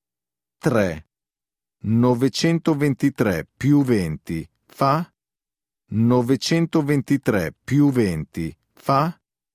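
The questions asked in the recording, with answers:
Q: 923 più 20 fa?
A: 943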